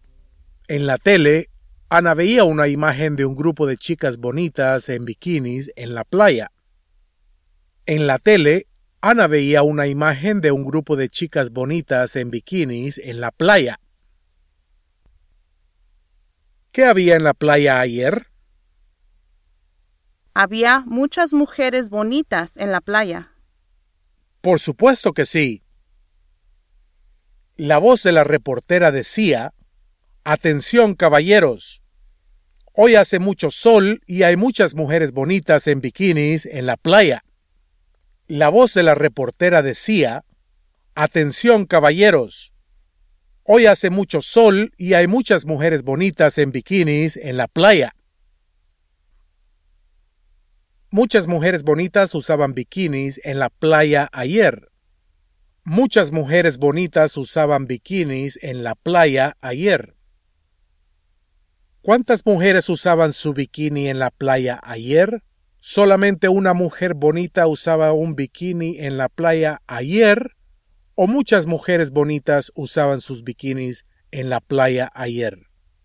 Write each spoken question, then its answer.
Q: ¿Cuántas mujeres usaban su bikini en la playa ayer?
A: Muchas mujeres bonitas usaban bikinis en la playa ayer.